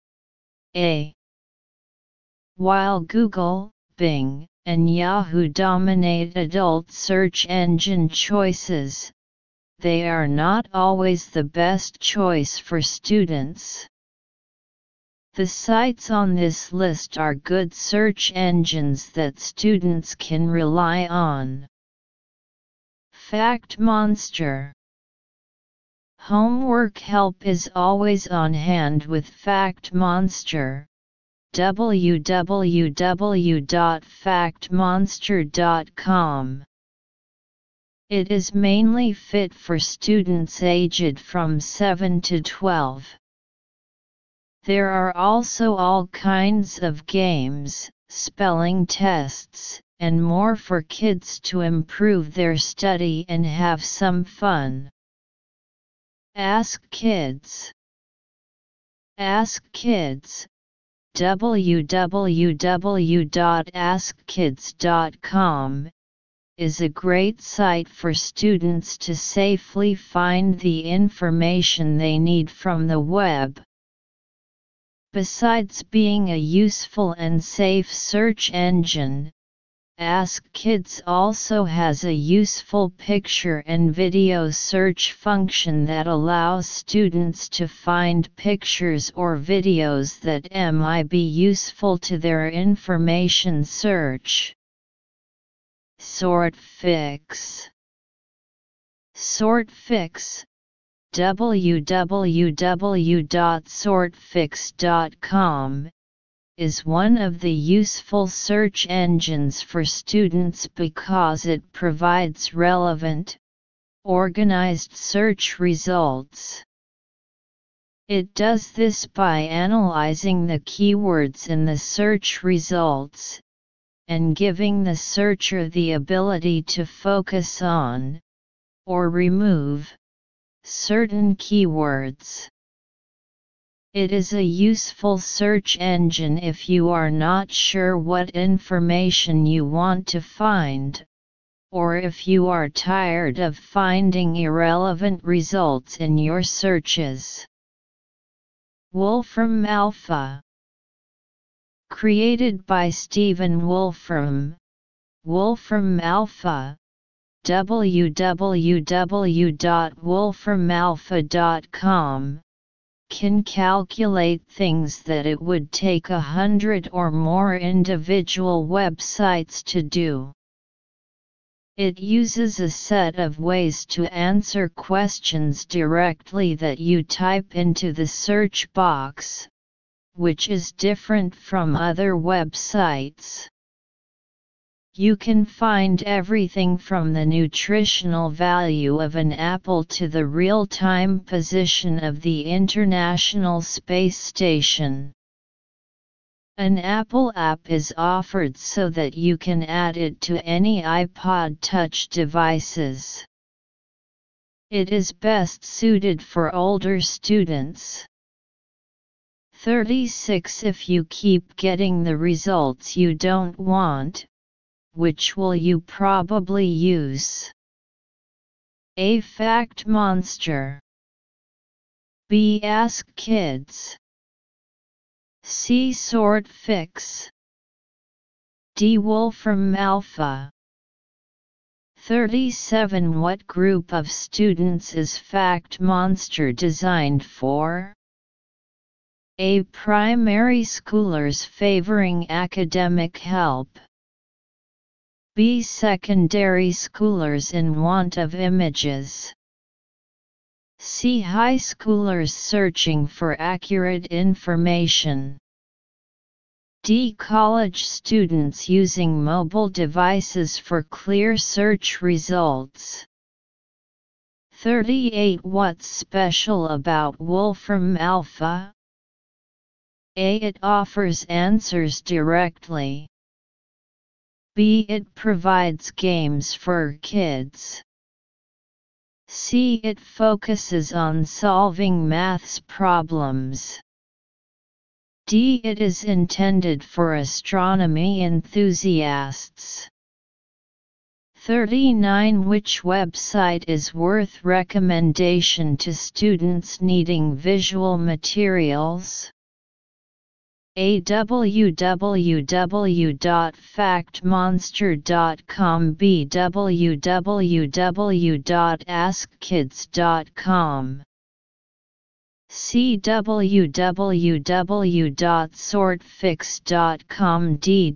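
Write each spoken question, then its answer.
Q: If you keep getting the results you don't want, which will you probably use?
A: C: Sortfix.

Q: What group of students is Fact Monster designed for?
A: A: Primary schoolers favoring academic help.

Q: What's special about Wolfram Alpha?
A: A: It offers answers directly.

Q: Which website is worth recommendation to students needing visual materials?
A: B: www.askkids.com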